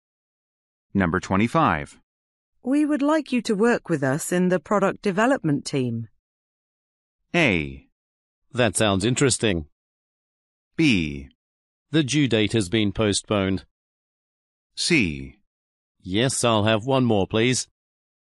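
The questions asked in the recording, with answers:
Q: We would like you to work with us in the product development team.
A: A: That sounds interesting.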